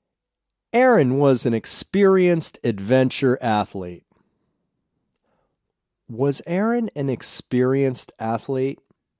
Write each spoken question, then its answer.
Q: Was Aaron an experienced athlete?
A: Yes, he was an experienced adventure athlete.